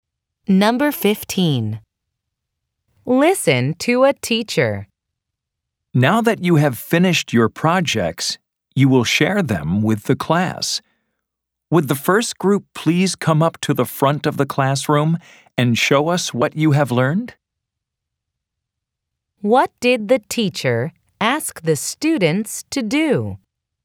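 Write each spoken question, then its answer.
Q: What did the teacher ask the students to do?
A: Share their projects with the class (the first group should come to the front)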